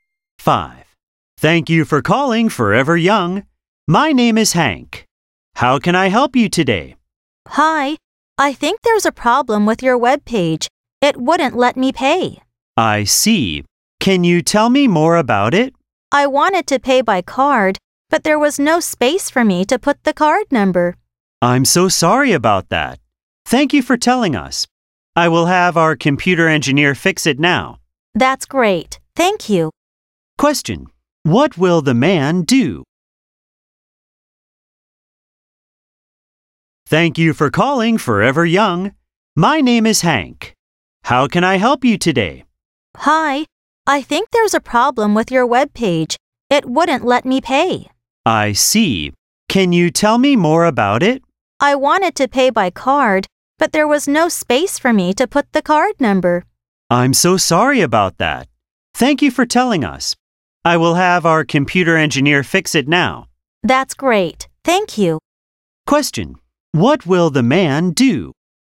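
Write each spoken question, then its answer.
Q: What will the man do?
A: Have the computer engineer fix the webpage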